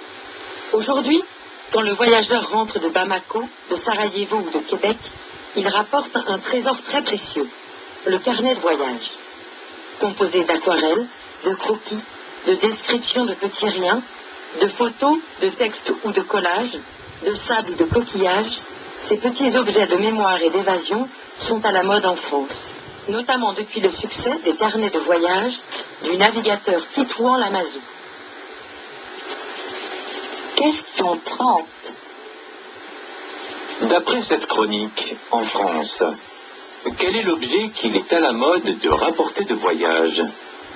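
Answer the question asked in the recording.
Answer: Le carnet de voyage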